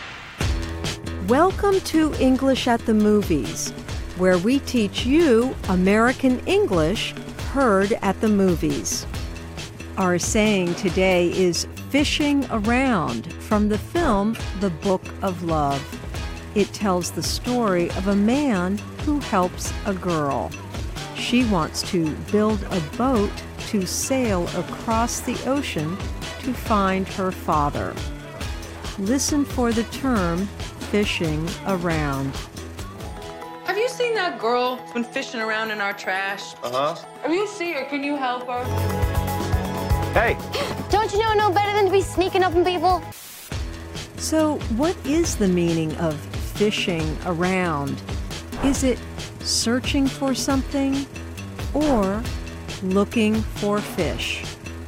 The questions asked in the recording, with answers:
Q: So, what is the meaning of fishing around? Is it searching for something or looking for fish?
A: Fishing around means searching for something.